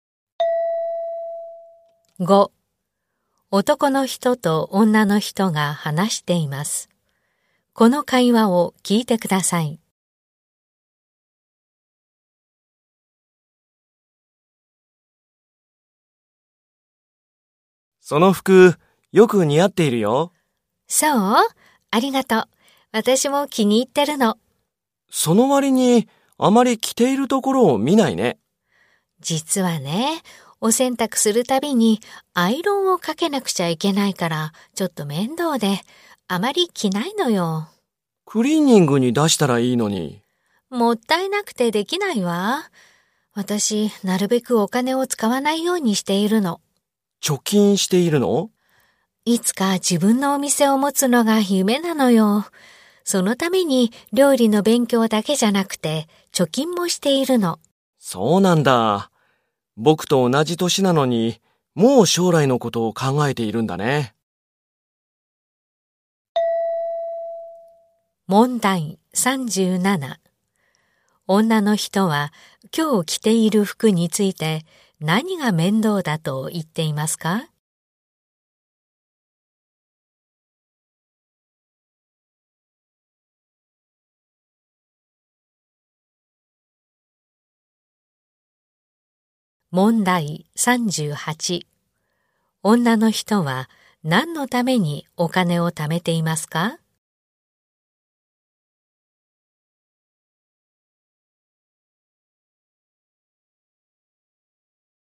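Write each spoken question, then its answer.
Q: 女の人は今日着ている服について何が面倒だと言っていますか?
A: 洗濯するたびにアイロンをかけること

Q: 女の人は何のためにお金を貯めていますか?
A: 自分のお店を持つため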